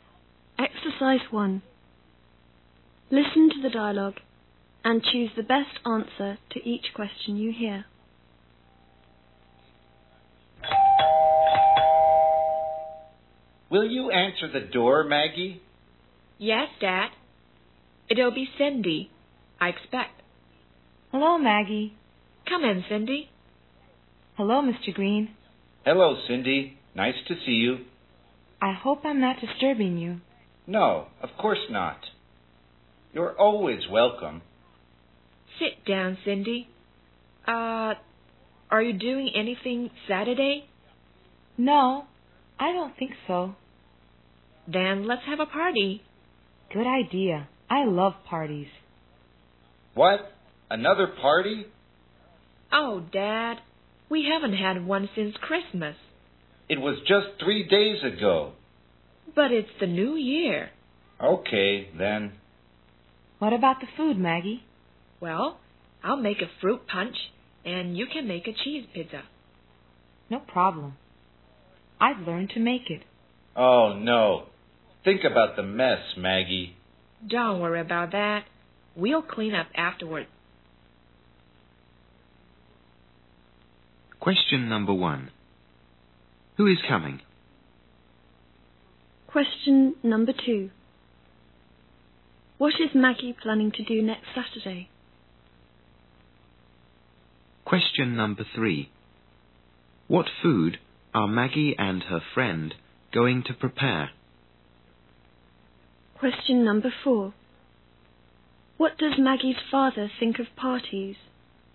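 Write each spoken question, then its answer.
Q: Who is coming?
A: Cindy

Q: What is Maggie planning to do next Saturday?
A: Have a party

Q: What food are Maggie and her friend going to prepare?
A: Fruit punch and cheese pizza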